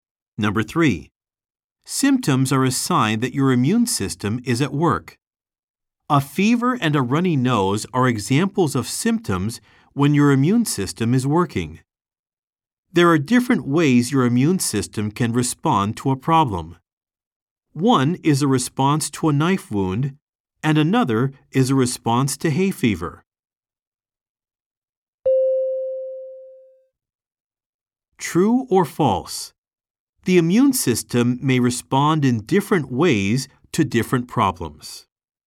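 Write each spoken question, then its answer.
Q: True or false? The immune system may respond in different ways to different problems.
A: True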